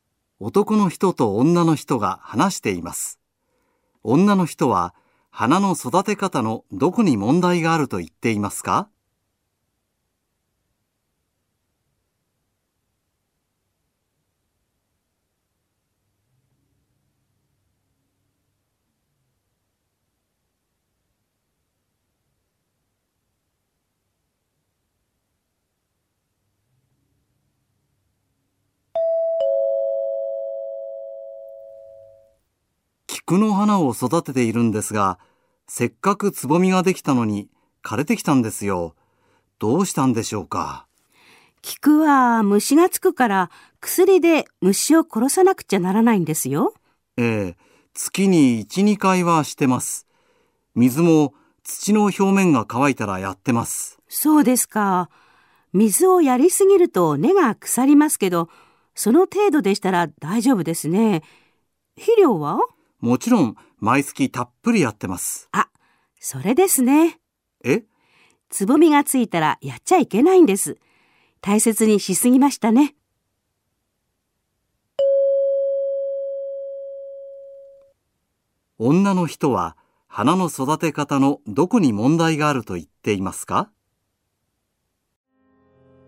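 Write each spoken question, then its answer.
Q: 女の人は花の育て方のどこに問題があると言っていますか?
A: つぼみがついた後も肥料をやったこと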